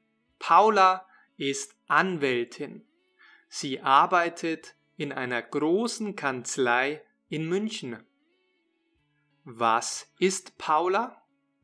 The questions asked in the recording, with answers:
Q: Was ist Paula?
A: Sie ist Anwältin.